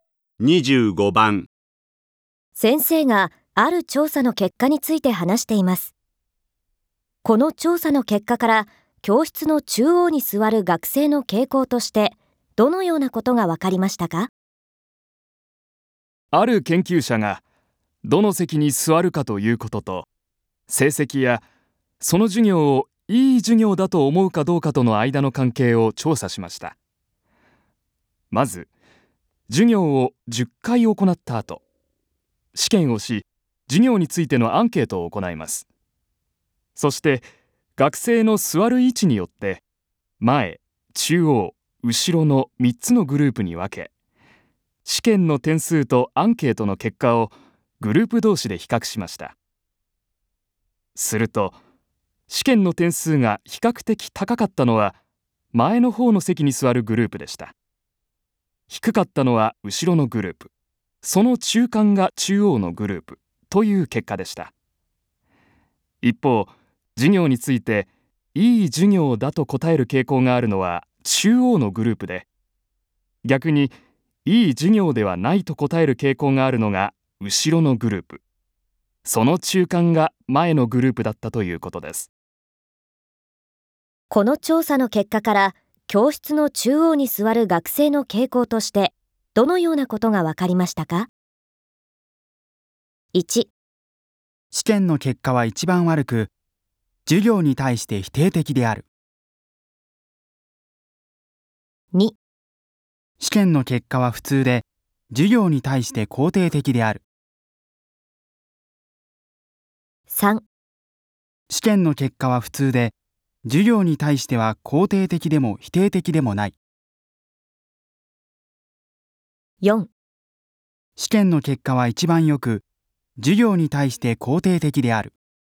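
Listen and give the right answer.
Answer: 2: 試験の結果は普通で、授業に対して肯定的である。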